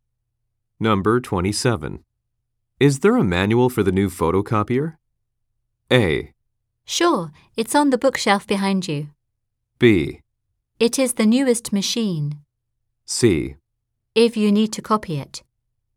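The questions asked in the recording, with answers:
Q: Is there a manual for the new photocopier?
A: A: Sure, it's on the bookshelf behind you.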